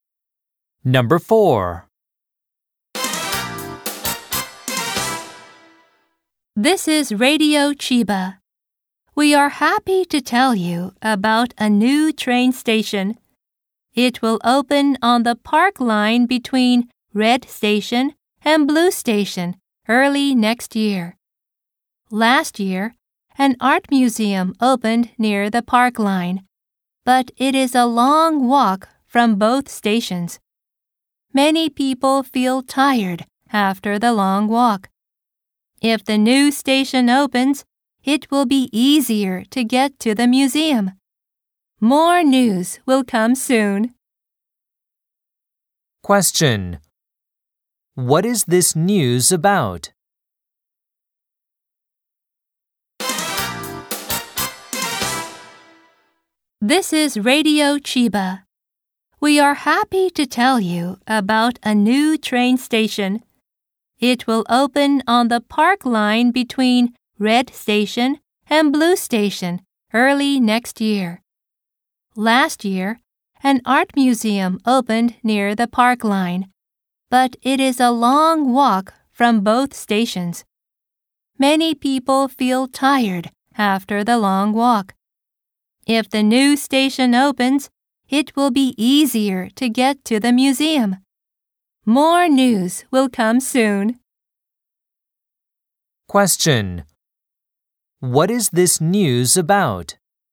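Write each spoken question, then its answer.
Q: What is this news about?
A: A new train station that will open near the art museum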